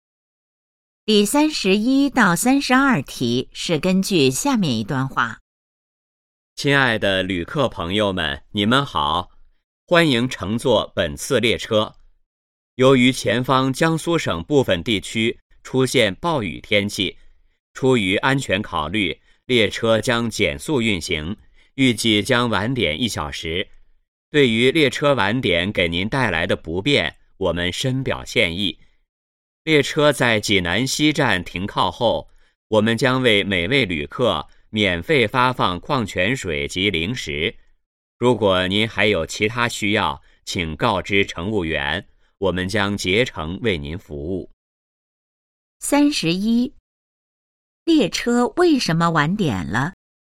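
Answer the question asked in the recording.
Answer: 前方江苏省部分地区出现暴雨,列车减速运行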